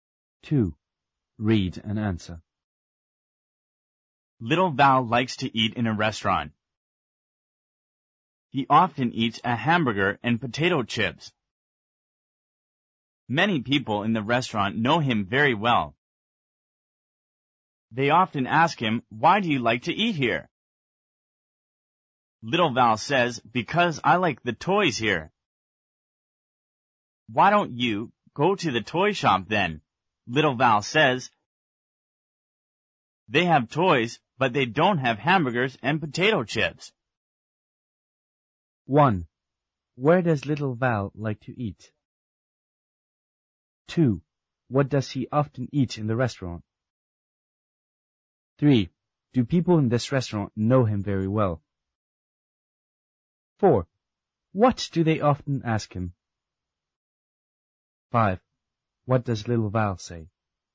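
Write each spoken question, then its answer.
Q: Where does Little Val like to eat?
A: In a restaurant.

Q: What does he often eat in the restaurant?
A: A hamburger and potato chips.

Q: Do people in this restaurant know him very well?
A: Yes, they do.

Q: What do they often ask him?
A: "Why do you like to eat here?"

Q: What does Little Val say?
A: "Because I like the toys here."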